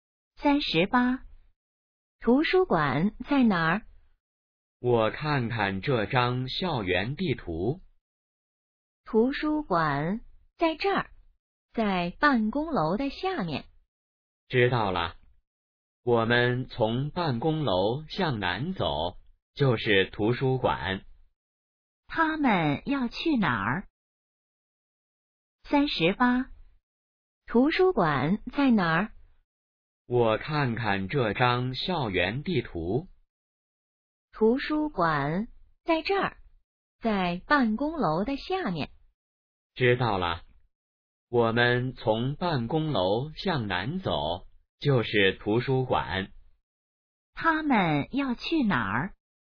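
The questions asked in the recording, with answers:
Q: 他们要去哪儿?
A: 图书馆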